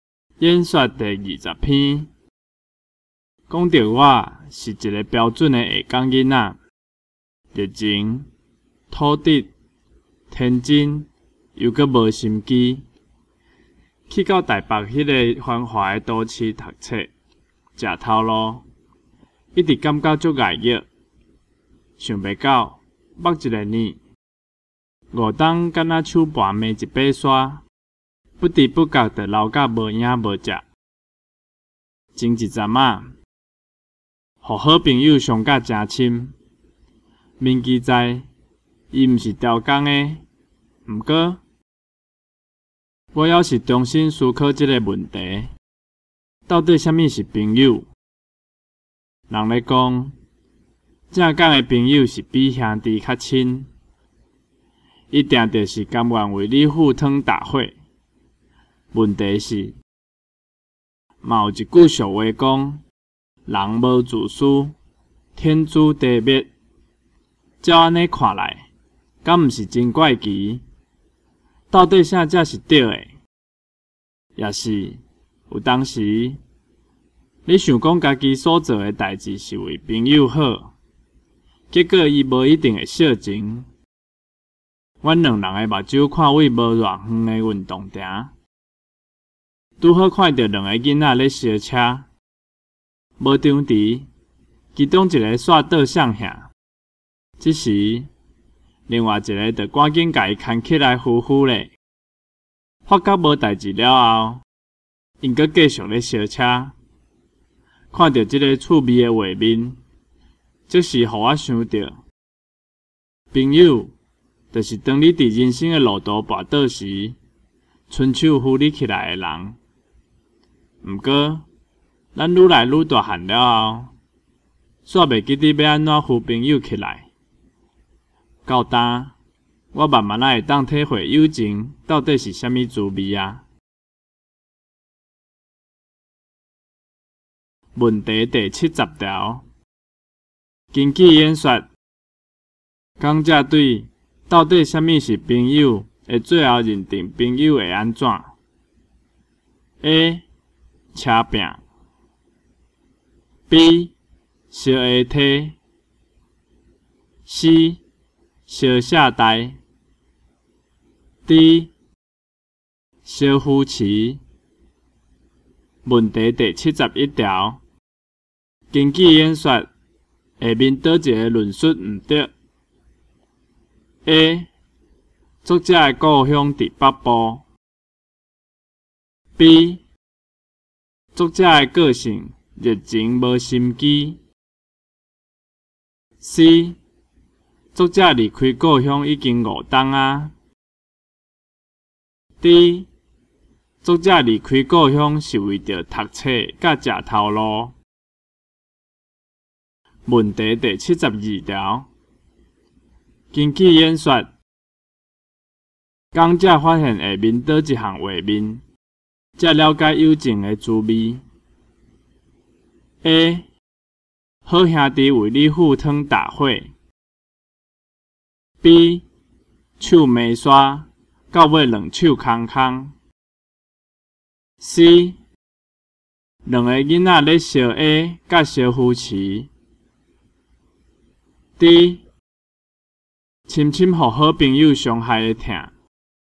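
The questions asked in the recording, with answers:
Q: 根据演说,下面倒一个论述唔对 ?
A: A: 作者的故乡伫北部

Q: 根据演说,讲者发现下面倒一项画面,才了解友情的滋味。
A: C: 两个囡仔咧烧 A 甲烧夫妻。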